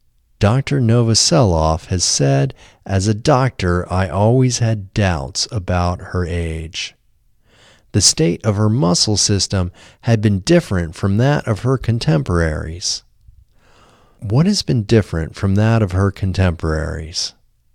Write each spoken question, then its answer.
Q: What has been different from that of her contemporaries?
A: The state of her muscle system has been different from that of her contemporaries.